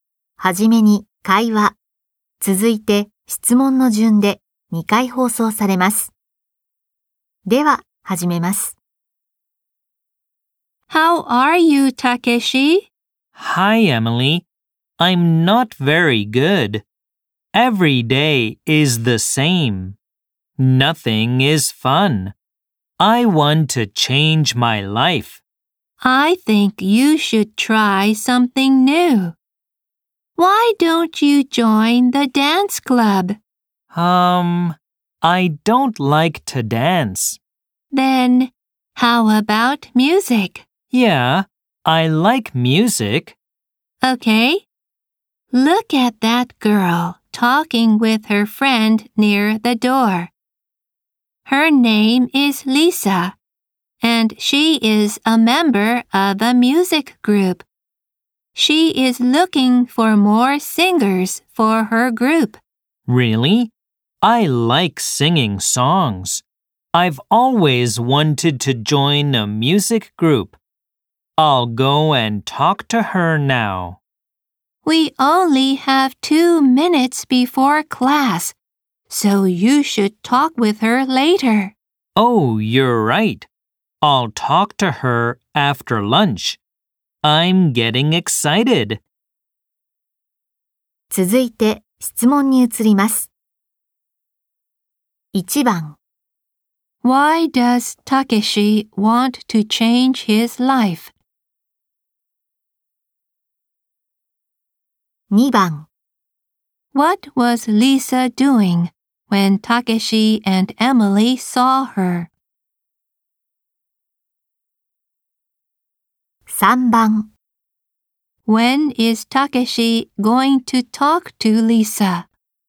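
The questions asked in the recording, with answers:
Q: Why does Takeshi want to change his life?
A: Because every day is the same and nothing is fun.

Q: What was Lisa doing when Takeshi and Emily saw her?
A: She was talking with her friend near the door.

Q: When is Takeshi going to talk to Lisa?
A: After lunch.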